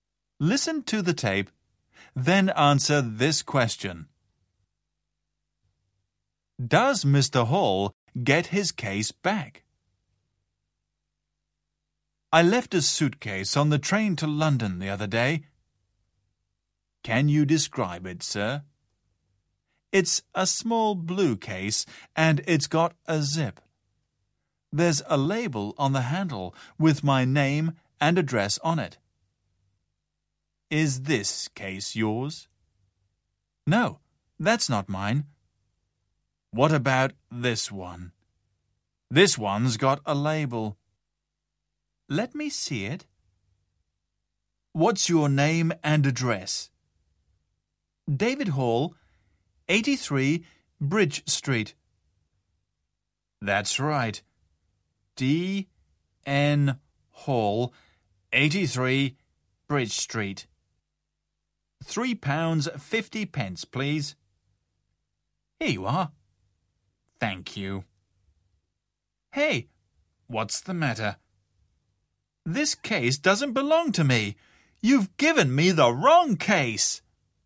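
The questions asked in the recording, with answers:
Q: Does Mr. Hall get his case back?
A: No, he is given the wrong case.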